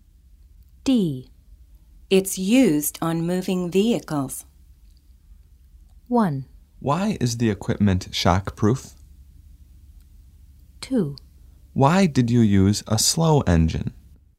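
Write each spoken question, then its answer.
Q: It's used on moving vehicles.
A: 1: Why is the equipment shockproof?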